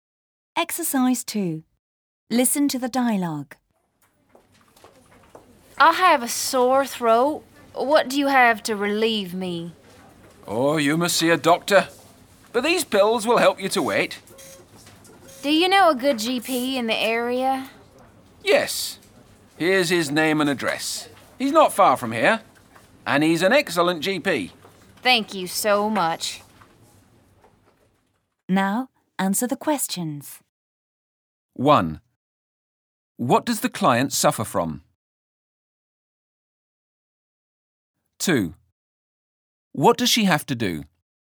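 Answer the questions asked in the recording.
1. A sore throat
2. See a doctor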